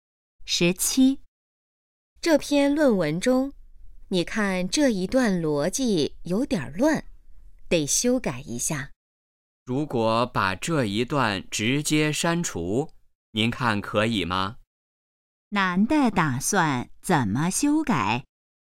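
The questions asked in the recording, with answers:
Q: 男的打算怎么修改?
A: 把这一段直接删除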